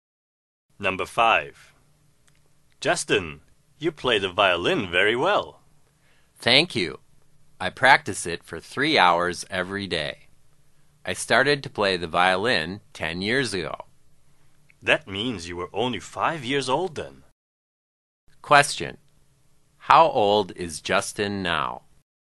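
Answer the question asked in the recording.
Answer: 15 years old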